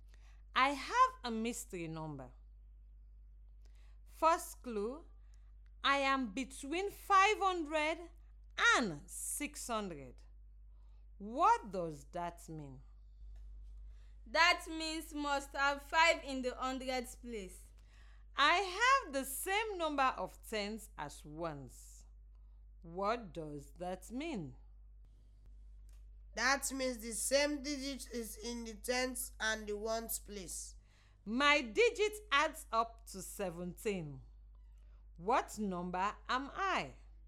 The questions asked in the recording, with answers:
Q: My digit adds up to 17. What number am I?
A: The number has to be 566.